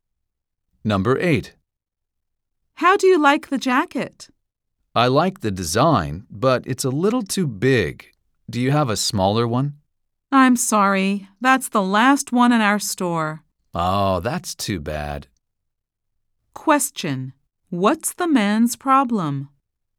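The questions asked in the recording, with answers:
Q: What's the man's problem?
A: The jacket is too big and there is no smaller one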